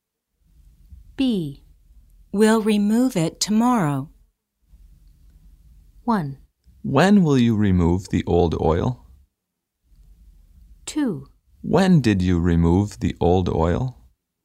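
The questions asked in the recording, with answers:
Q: We'll remove it tomorrow.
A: 1: When will you remove the old oil?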